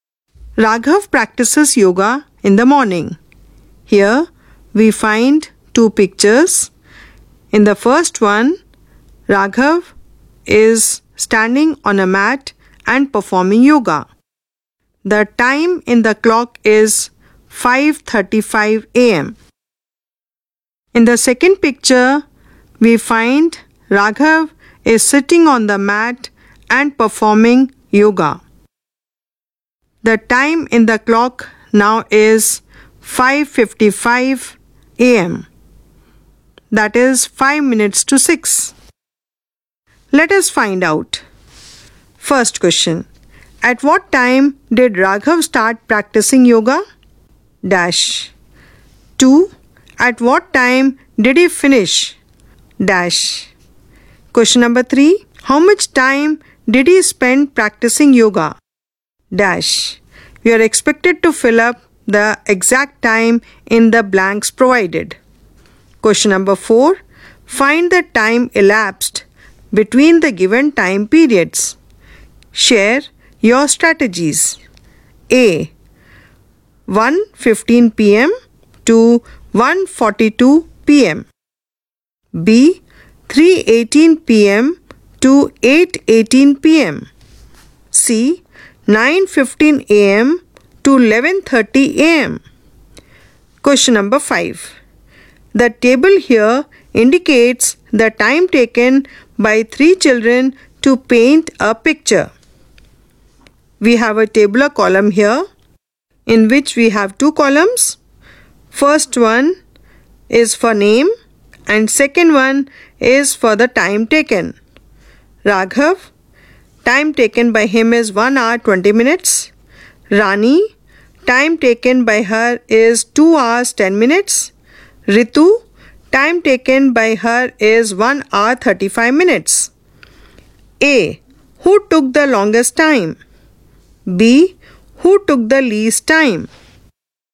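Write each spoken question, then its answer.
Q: At what time did Raghav start practicing yoga?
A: 5:35 a.m.

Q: At what time did he finish?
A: 5:55 a.m.

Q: How much time did he spend practicing yoga?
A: 20 minutes

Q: B. 3:18 p.m. to 8:18 p.m.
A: 5 hours

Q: C. 9:15 a.m. to 11:30 a.m.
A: 2 hours 15 minutes

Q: A. Who took the longest time?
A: Rani

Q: B. Who took the least time?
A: Raghav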